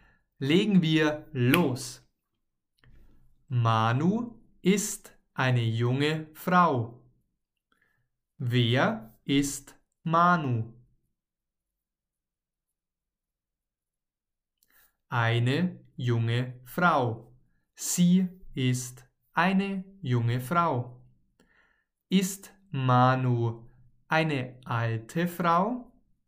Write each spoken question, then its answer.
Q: Ist Manu eine alte Frau?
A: Nein, sie ist keine alte Frau.